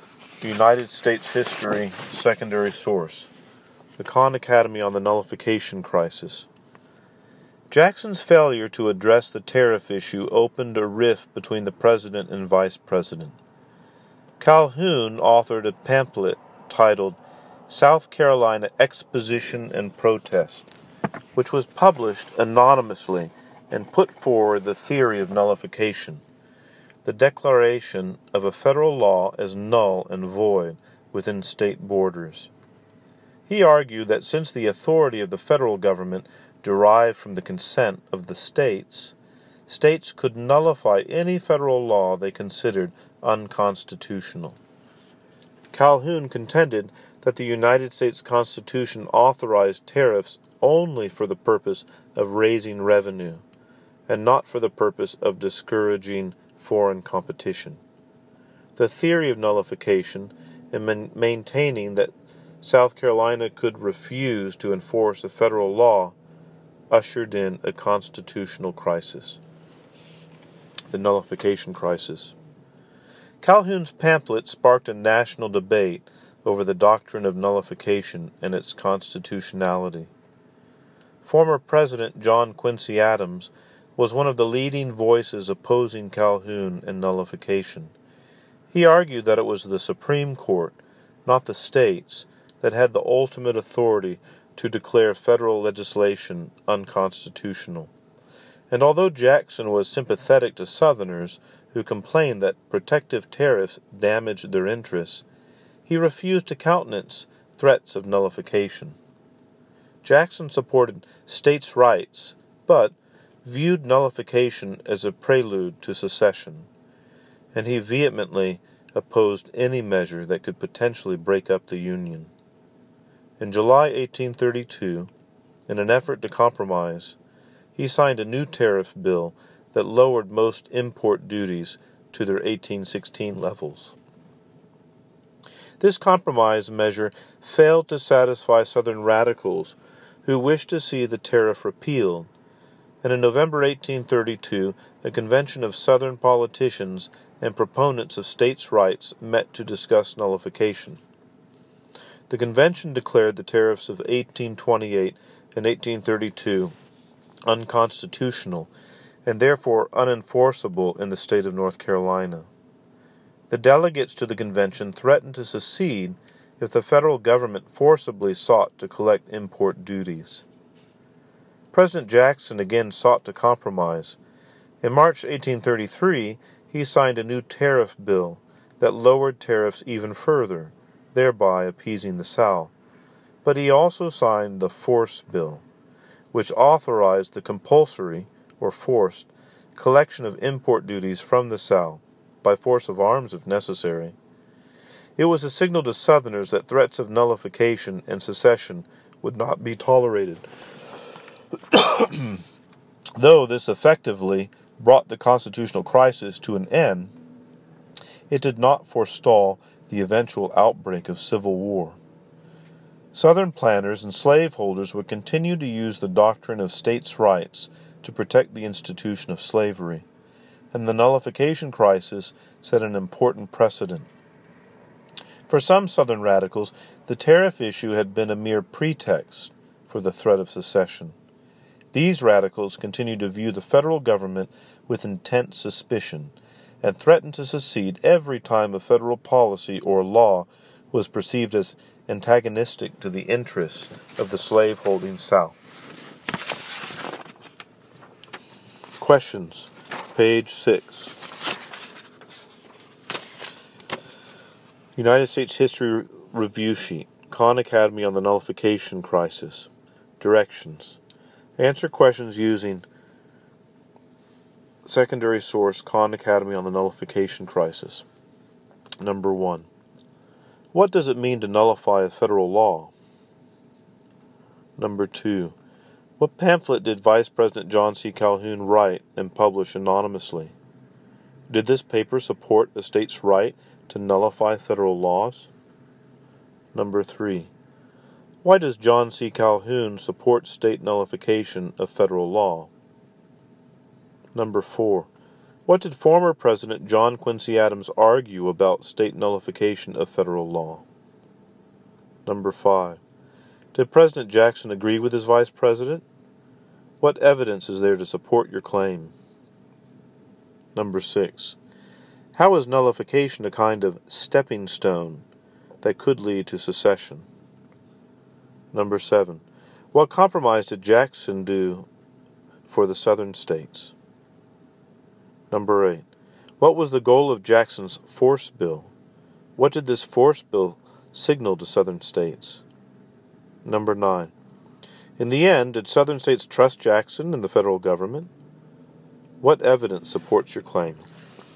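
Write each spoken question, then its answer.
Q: What does it mean to nullify a federal law?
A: To declare a federal law null and void within the state's borders

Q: What pamphlet did Vice President John C.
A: South Carolina Exposition and Protest

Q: Did this paper support a state's right to nullify federal laws?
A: Yes

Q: Why does John C.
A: Because the federal government's authority comes from the consent of the states, and the Constitution allowed tariffs only to raise revenue

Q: What did former President John Quincy Adams argue about state nullification of federal law?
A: That the Supreme Court, not the states, had the final authority to declare federal laws unconstitutional

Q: Did President Jackson agree with his vice president?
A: No; he would not accept threats of nullification and he signed the Force Bill

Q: What compromise did Jackson do for the southern states?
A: He signed tariff bills that lowered tariffs (to 1816 levels in 1832, and even further in 1833)

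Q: What was the goal of Jackson's force bill?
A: To allow import duties to be collected from the South by force if necessary

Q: What did this force bill signal to southern states?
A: That threats of nullification and secession would not be tolerated

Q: In the end, did southern states trust Jackson and the federal government?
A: No; radicals stayed very suspicious and kept threatening to secede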